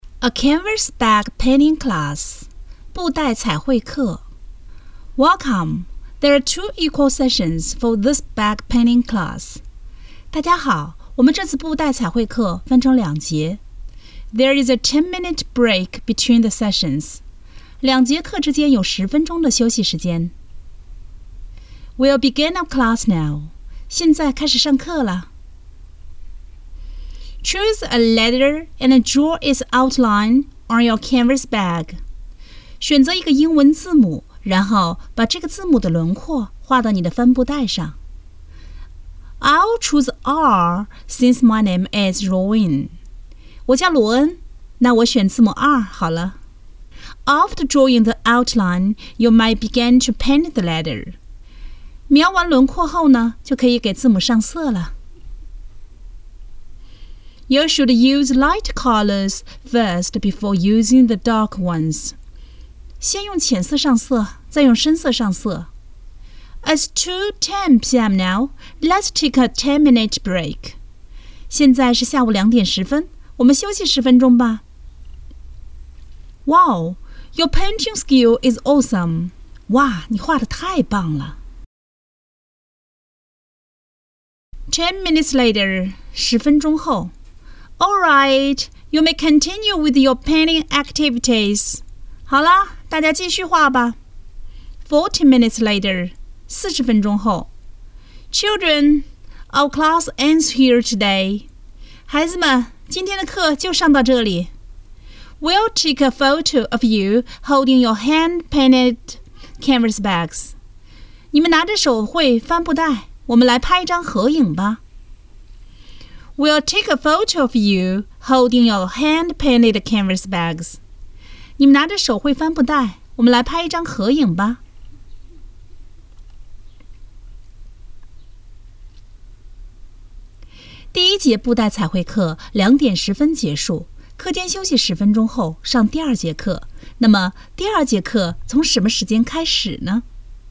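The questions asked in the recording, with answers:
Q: 那么第二节课从什么时间开始呢?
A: 下午两点二十分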